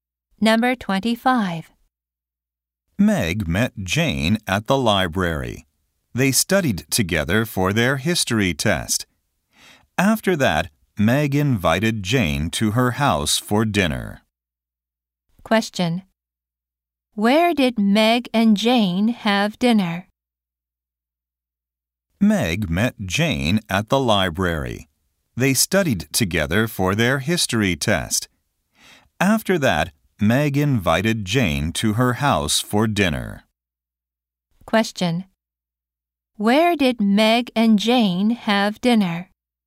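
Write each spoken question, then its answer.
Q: Where did Meg and Jane have dinner?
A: At Meg's house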